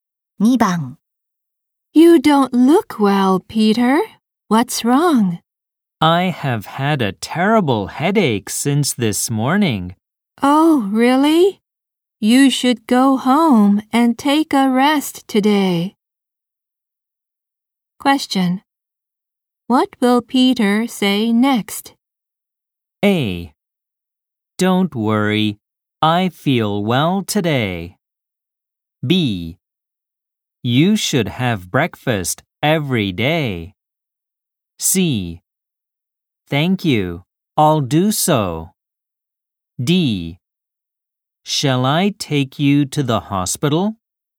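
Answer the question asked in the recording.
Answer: C: Thank you, I'll do so.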